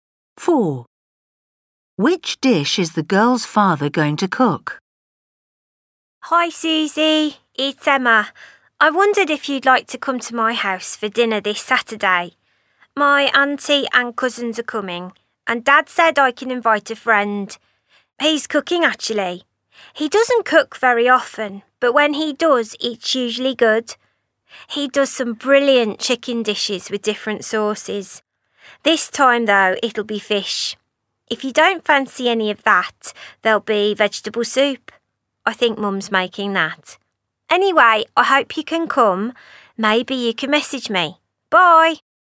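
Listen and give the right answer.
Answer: fish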